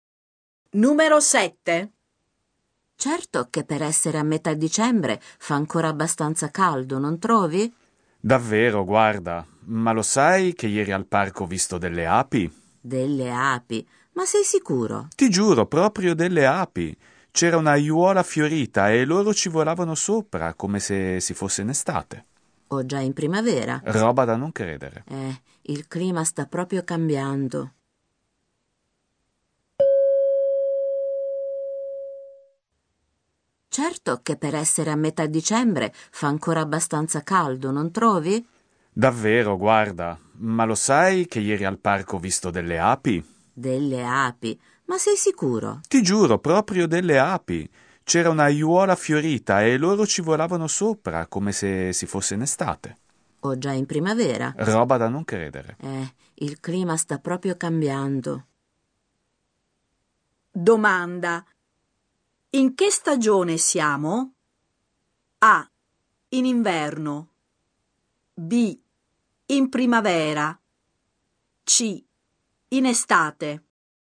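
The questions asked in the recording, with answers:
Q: Domanda. In che stagione siamo?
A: A: In inverno.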